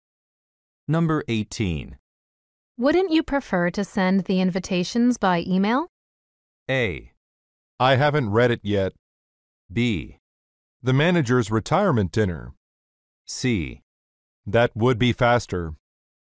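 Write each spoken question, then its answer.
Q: Wouldn't you prefer to send the invitations by email?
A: C: That would be faster.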